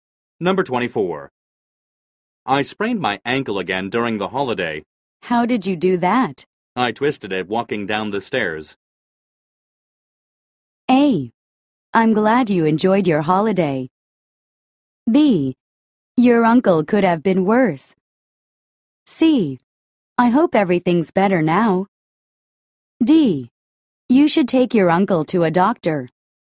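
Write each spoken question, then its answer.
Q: I twisted it walking down the stairs.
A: C: I hope everything's better now.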